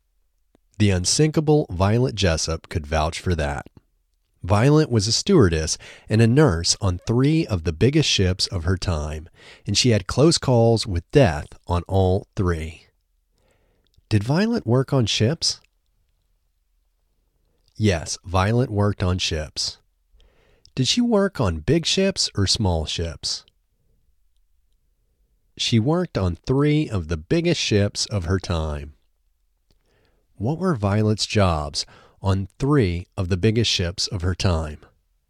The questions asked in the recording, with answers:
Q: Did Violet work on ships?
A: Yes, Violet worked on ships.

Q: What were Violet's jobs on three of the biggest ships of her time?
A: Violet was a stewardess and a nurse on three of the biggest ships of her time.